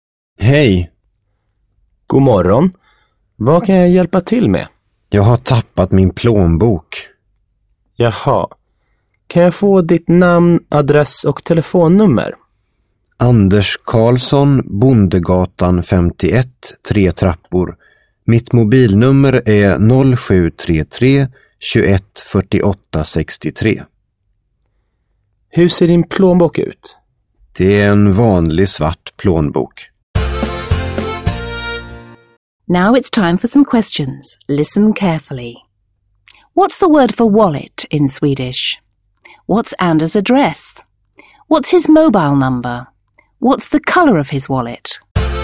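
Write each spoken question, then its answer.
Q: What's the word for wallet in Swedish?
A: plånbok

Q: What's Anders address?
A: Bondegatan 51, 3 trappor

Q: What's his mobile number?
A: 0733 21 48 63

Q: What's the color of his wallet?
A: black (svart)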